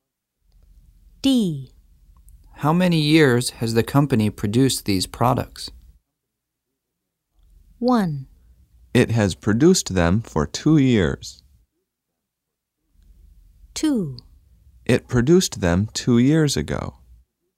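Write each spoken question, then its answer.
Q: How many years has the company produced these products?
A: 1: It has produced them for 2 years.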